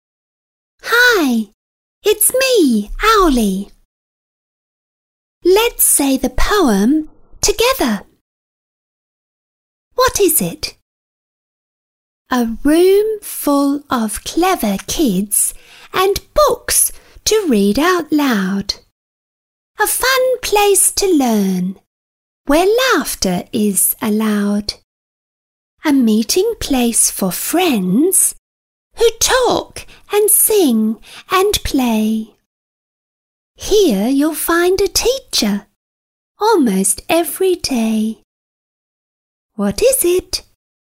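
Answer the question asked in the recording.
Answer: a school classroom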